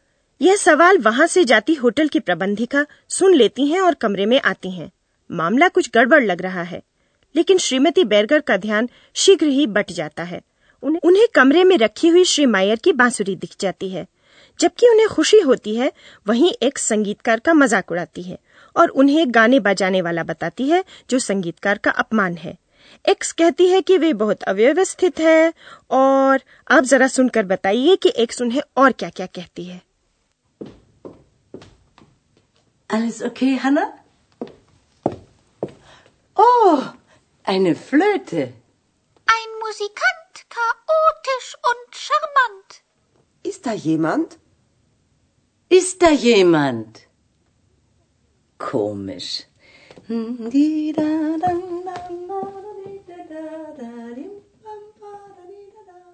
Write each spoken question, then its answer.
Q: आप जरा सुनकर बताइए कि x उन्हें और क्या क्या कहती है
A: एक संगीतकार को सौम्य शाहमंट भी कहती है